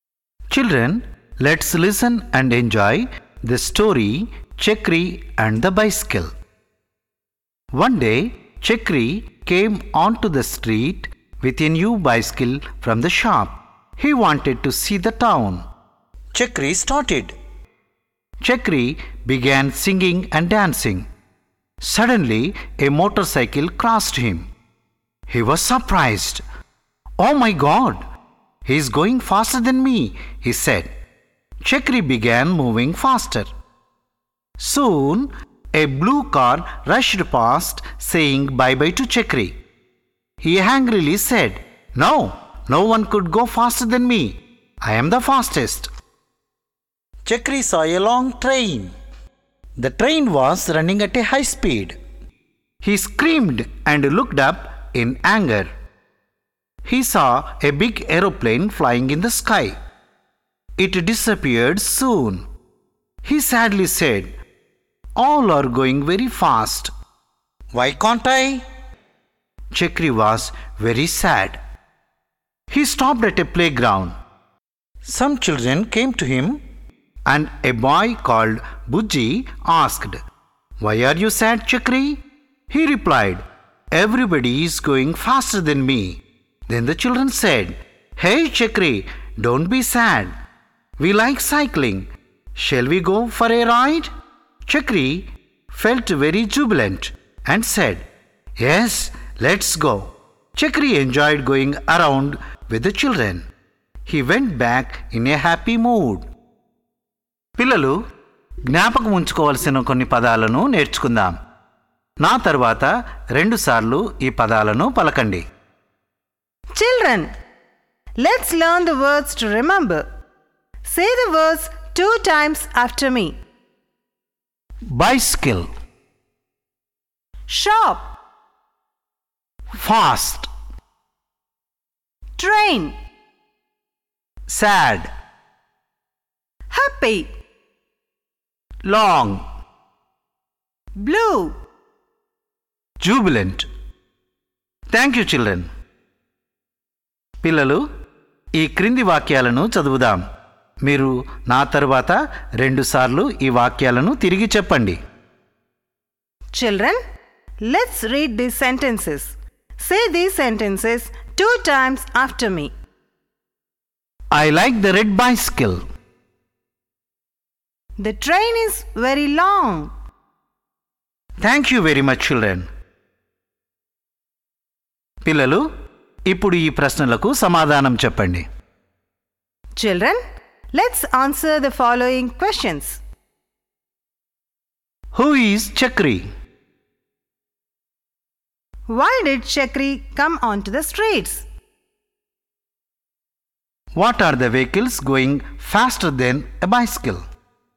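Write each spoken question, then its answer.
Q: Why did Chakri come onto the streets?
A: He wanted to see the town.

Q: What are the vehicles going faster than a bicycle?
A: A motorcycle, a blue car, a train and an aeroplane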